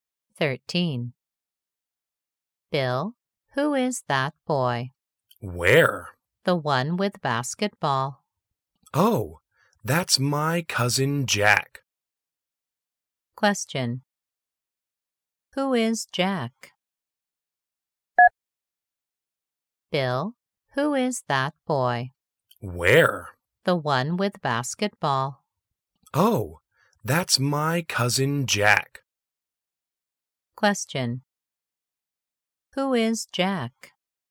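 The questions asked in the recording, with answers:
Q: Who is Jack?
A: Bill's cousin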